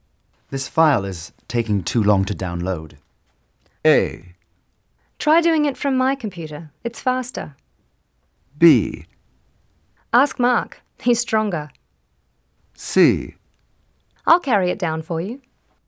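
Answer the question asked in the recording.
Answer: A: Try doing it from my computer. It's faster.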